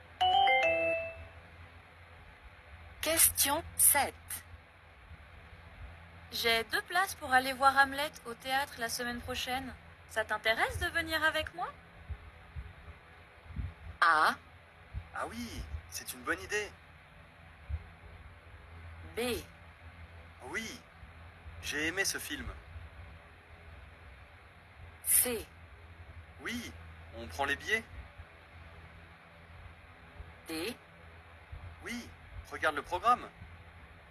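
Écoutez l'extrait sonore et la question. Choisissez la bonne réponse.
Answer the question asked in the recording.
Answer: Ah oui, c'est une bonne idée.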